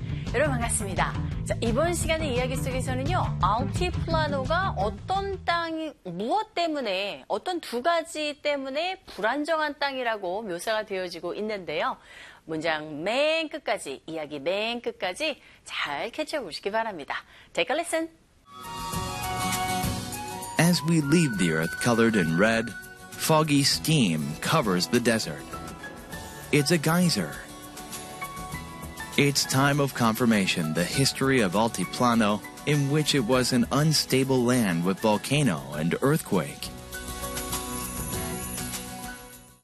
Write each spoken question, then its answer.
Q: 알티플라노가 어떤 땅이 무엇 때문에 어떤 두 가지 때문에 불안정한 땅이라고 묘사가 되어지고 있는데요.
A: 화산과 지진 때문에 불안정한 땅이었다고 합니다.